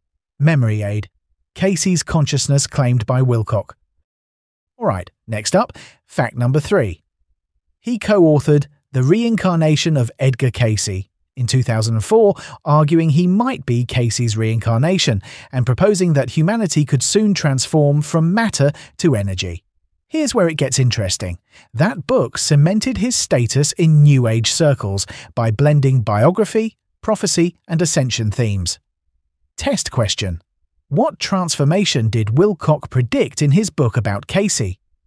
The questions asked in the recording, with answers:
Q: What transformation did Wilcock predict in his book about Cayce?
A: Correct answer. From matter to energy.